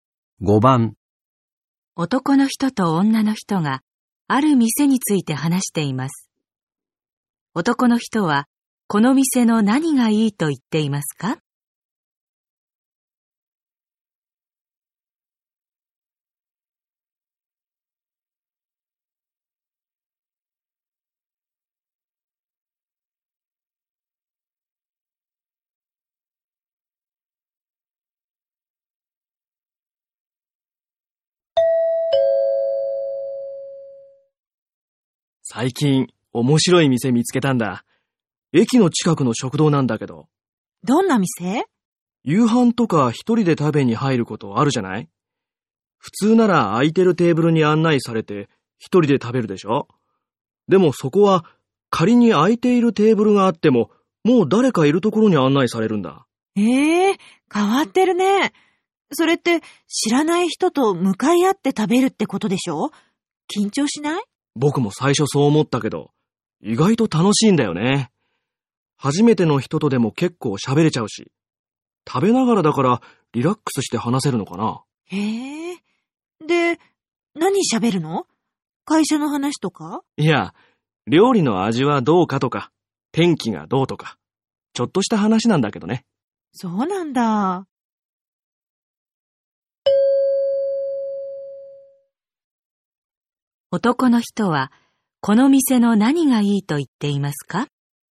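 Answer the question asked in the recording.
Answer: 知らない人と同じテーブルで気軽に話せること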